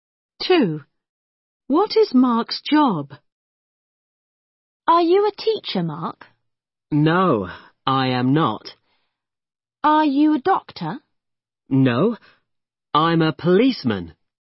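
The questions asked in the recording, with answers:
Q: What is Mark's job?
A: a policeman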